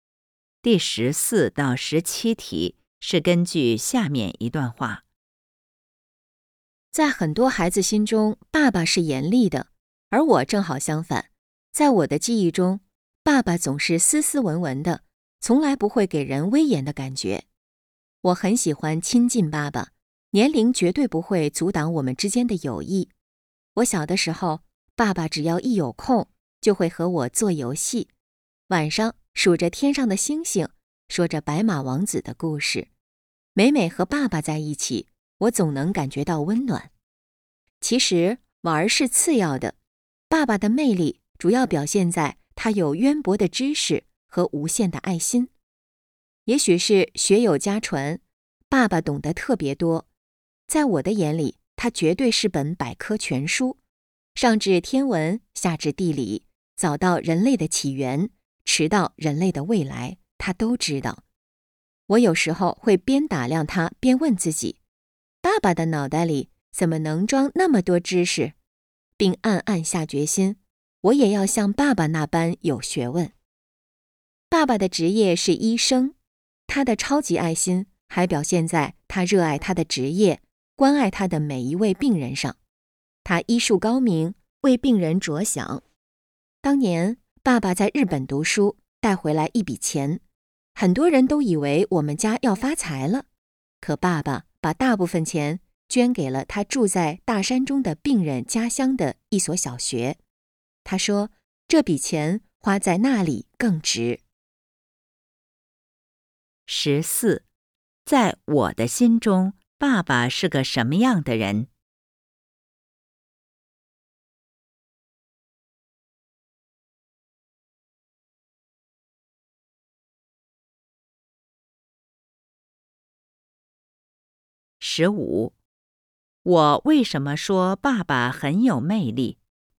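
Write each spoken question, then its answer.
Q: 在我的心中,爸爸是个什么样的人?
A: 斯斯文文、不严厉的人

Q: 我为什么说爸爸很有魅力?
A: 他有渊博的知识和无限的爱心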